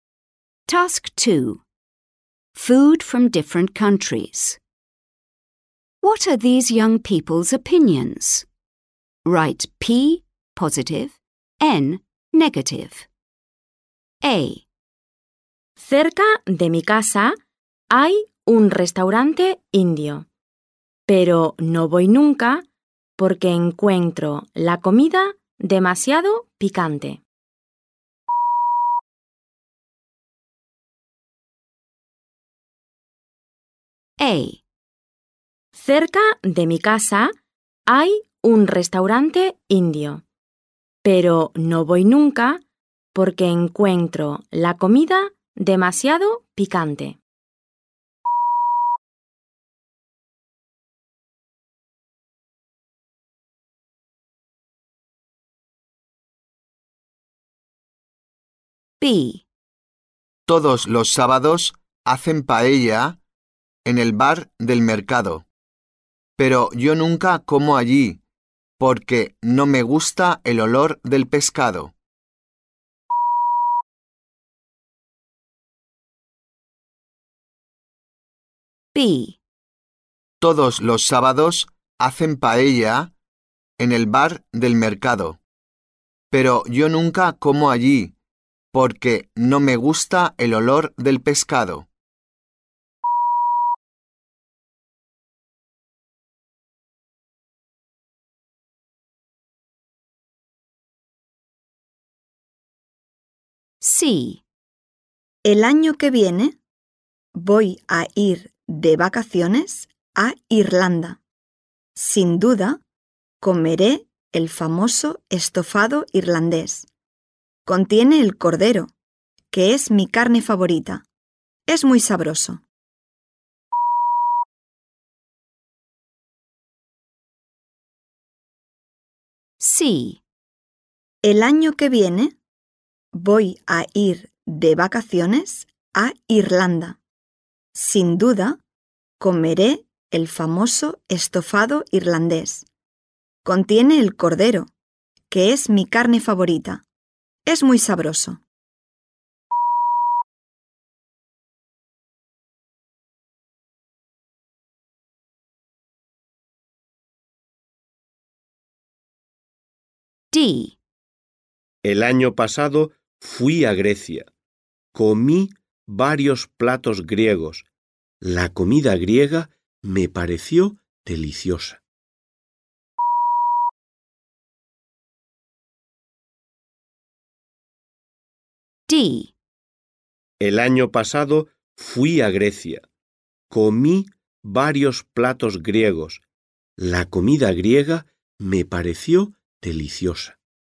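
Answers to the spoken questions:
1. N (negative)
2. N (negative)
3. P (positive)
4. P (positive)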